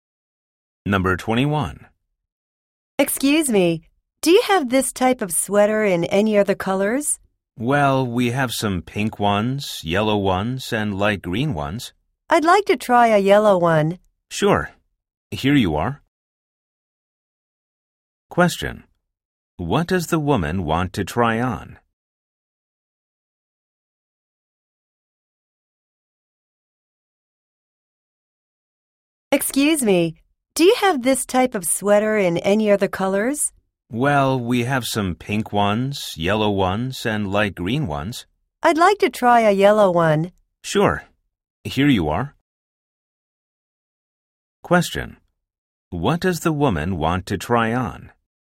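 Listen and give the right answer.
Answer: A yellow sweater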